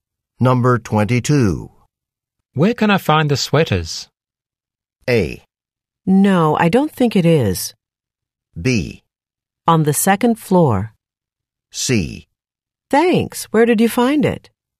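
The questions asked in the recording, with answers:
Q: Where can I find the sweaters?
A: B: On the second floor.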